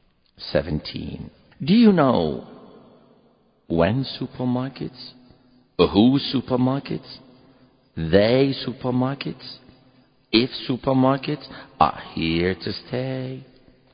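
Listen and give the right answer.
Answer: D: if supermarkets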